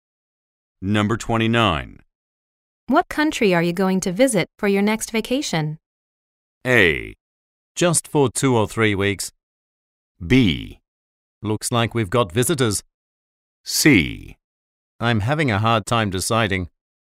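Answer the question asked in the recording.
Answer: C: I'm having a hard time deciding.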